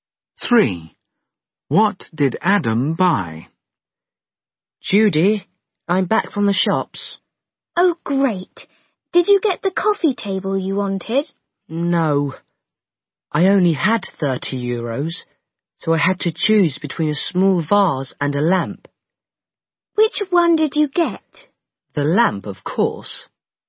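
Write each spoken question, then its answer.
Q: What did Adam buy?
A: a lamp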